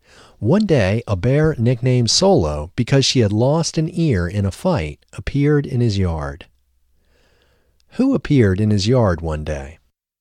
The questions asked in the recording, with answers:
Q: Who appeared in his yard one day?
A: A bear nicknamed Solo appeared in his yard one day.